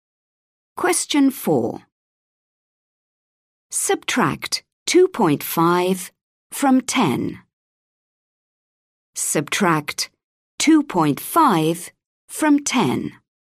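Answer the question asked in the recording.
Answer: 7.5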